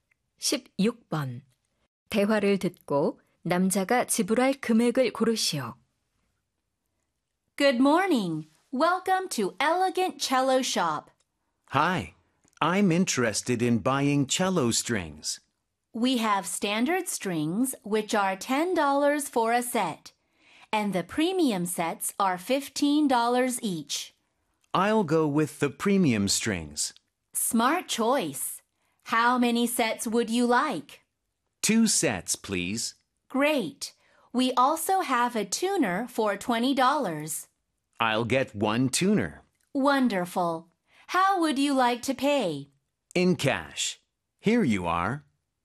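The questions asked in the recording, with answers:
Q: 대화를 듣고 남자가 지불할 금액을 고르시오.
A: 50달러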